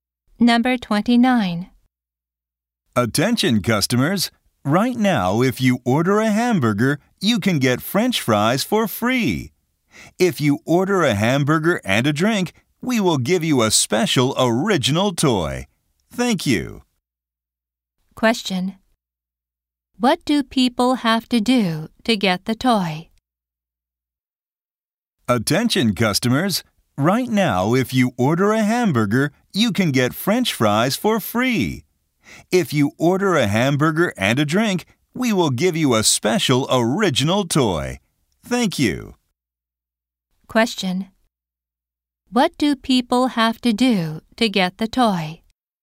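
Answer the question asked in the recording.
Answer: Order a hamburger and a drink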